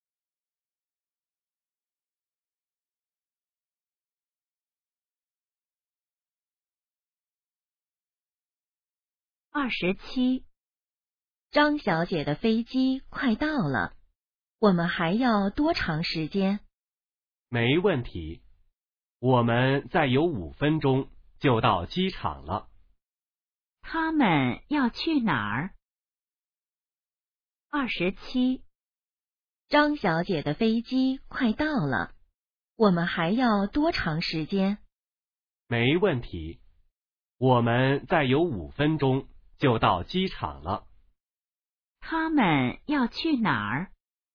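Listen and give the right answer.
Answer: 机场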